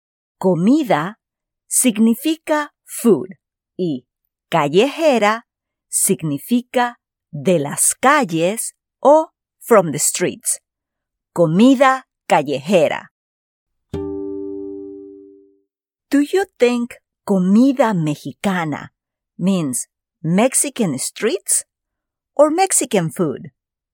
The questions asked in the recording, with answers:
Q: Do you think comida mexicana means Mexican streets or Mexican food?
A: Muy bien. Comida mexicana significa Mexican food en inglés.